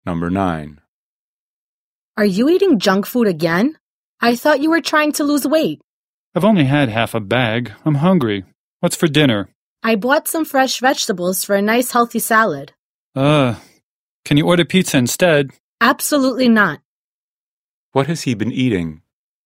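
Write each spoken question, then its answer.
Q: What has he been eating?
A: Junk food (half a bag)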